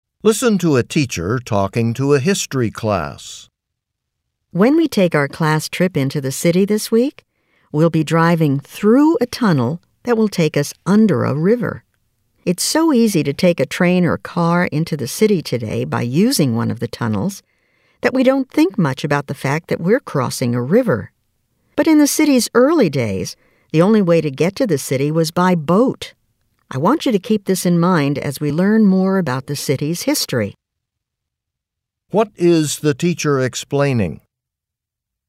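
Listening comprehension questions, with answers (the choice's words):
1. What is the teacher explaining?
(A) Why the city is located where it is.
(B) How travel to the city has changed over time.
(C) How the first tunnels in the city were built.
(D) Why the river is important to the city's history.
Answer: How travel to the city has changed over time.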